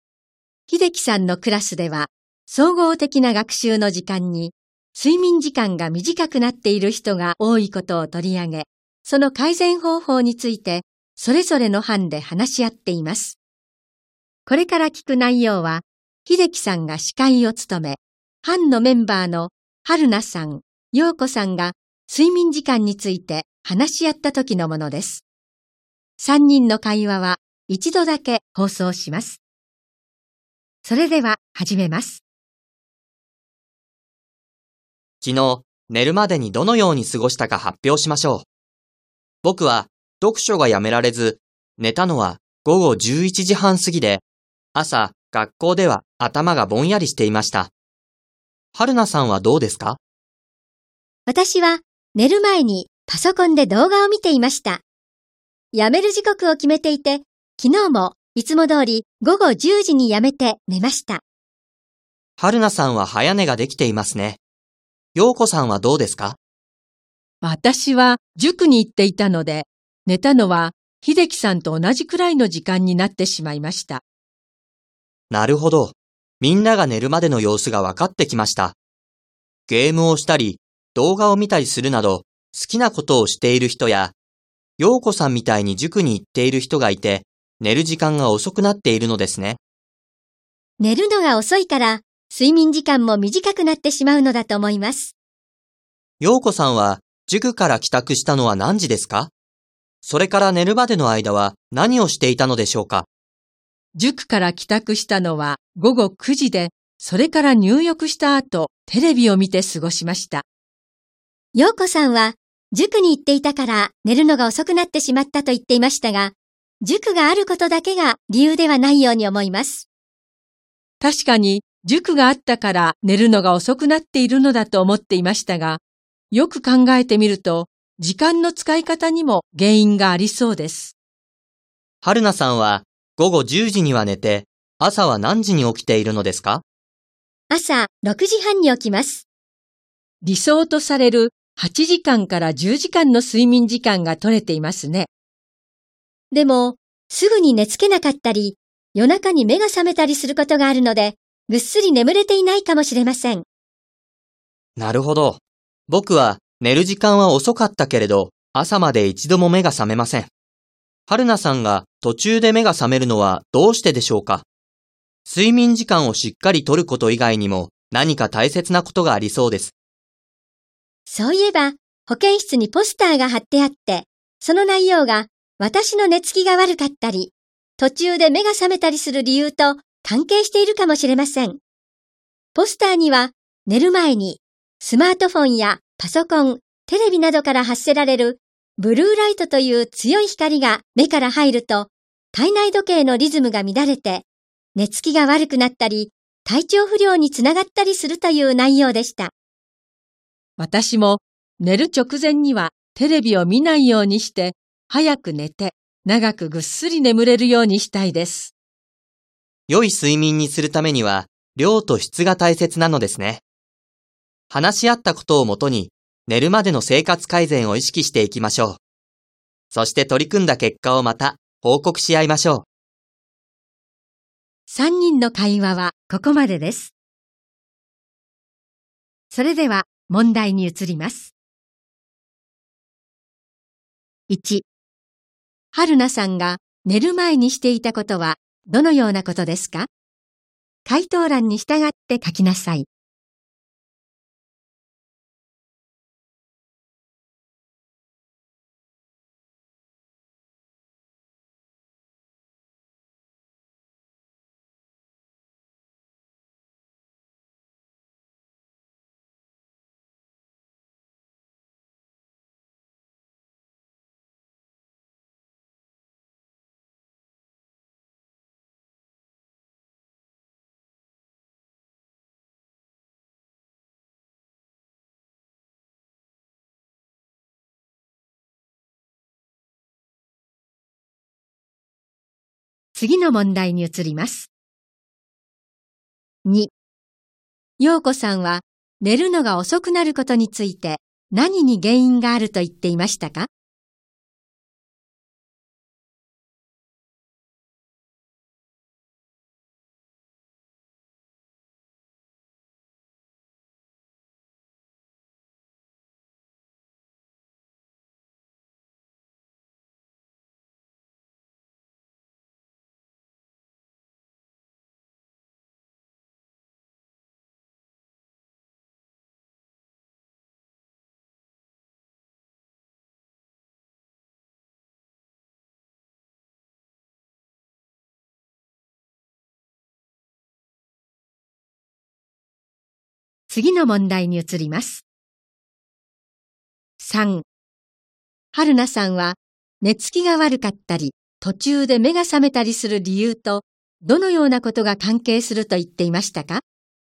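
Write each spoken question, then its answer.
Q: 春菜さんが寝る前にしていたことはどのようなことですか?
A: パソコンで動画を見ていた(時刻を決めて午後10時にやめた)

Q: 陽子さんは 寝るのが遅くなることについて何に原因があると言っていましたか?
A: 時間の使い方

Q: はるなさんは寝つきが悪かったり、途中で目が覚めたりする理由と、どのようなことが関係すると言っていましたか?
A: 保健室のポスターの内容(寝る前にブルーライトが目から入ると体内時計のリズムが乱れること)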